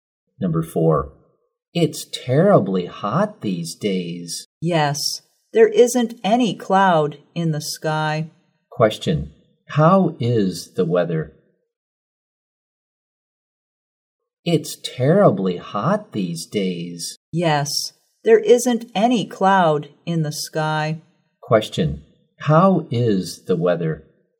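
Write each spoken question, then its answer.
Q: Question, how is the weather?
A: Hot and sunny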